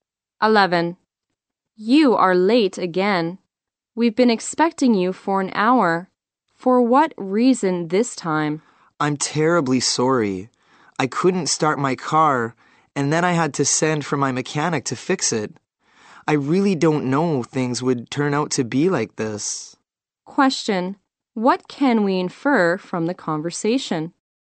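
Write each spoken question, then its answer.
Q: What can we infer from the conversation?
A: The man is late because his car wouldn't start and he had to get a mechanic to fix it.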